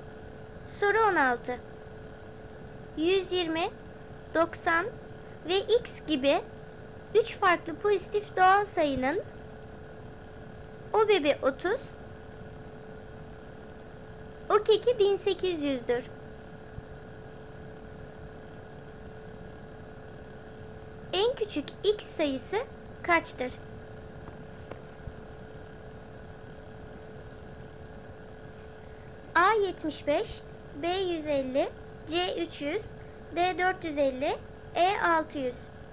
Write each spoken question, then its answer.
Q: En küçük X sayısı kaçtır?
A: Doğru cevap B 150.